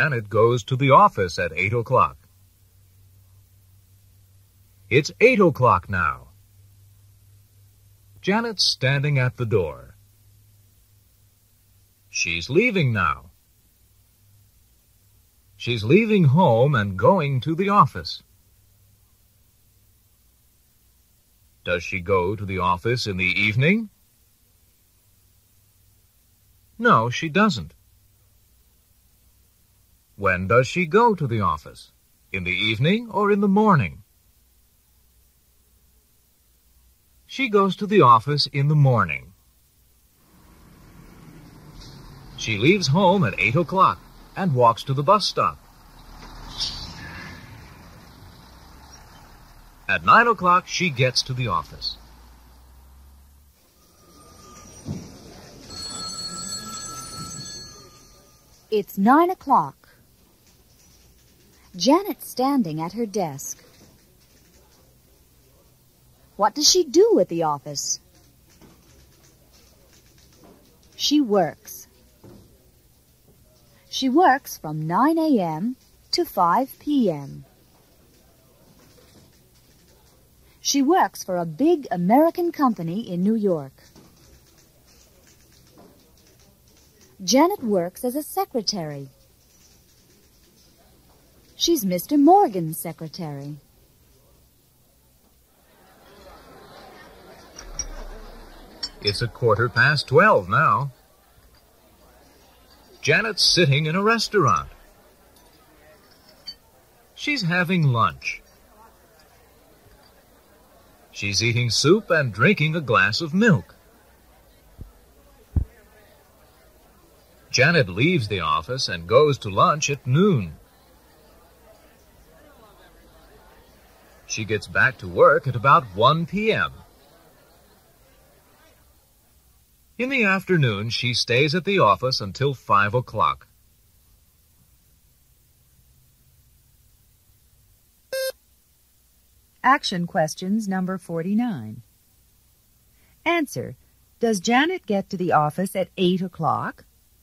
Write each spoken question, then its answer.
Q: Does Janet get to the office at 8 o'clock?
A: No, she doesn't.